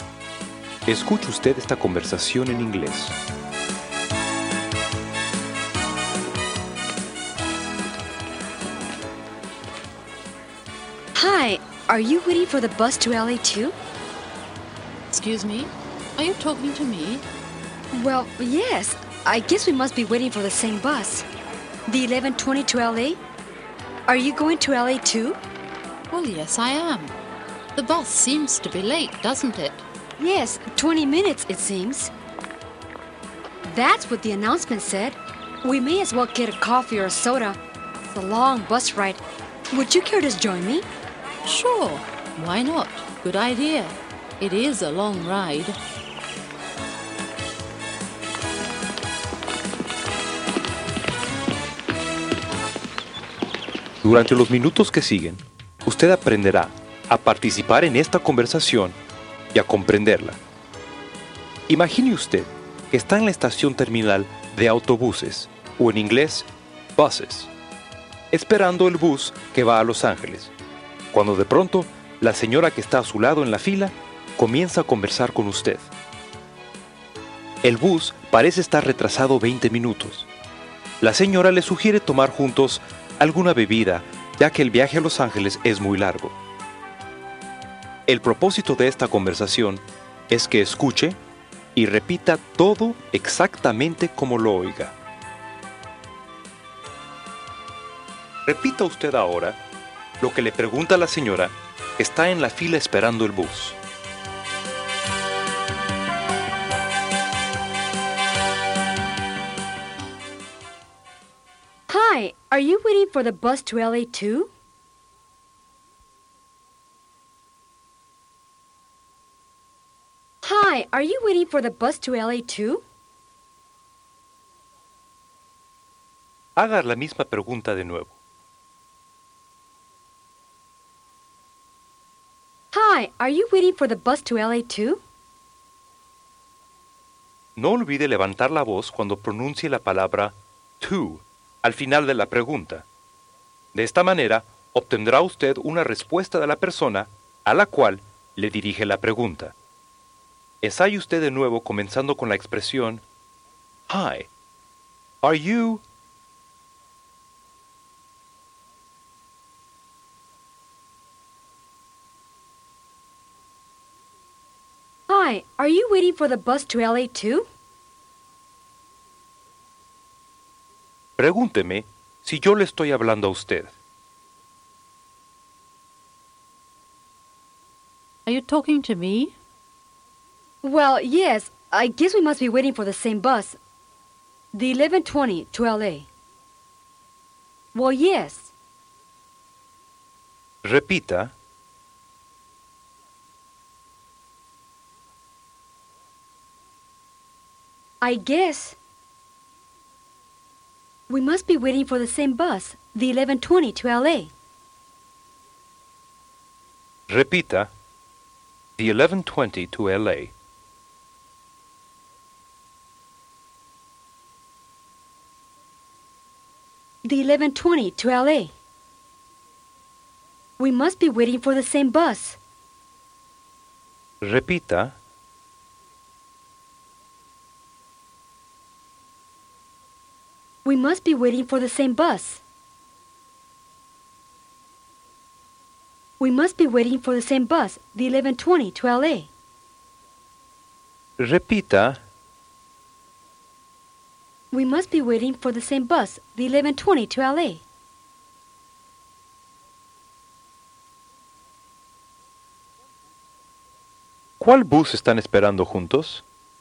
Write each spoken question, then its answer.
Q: ¿Cuál bus están esperando juntos?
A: The 1120 to LA.